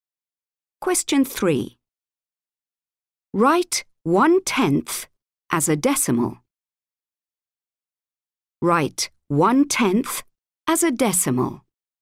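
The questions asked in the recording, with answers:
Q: Write 1/10 as a decimal.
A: 0.1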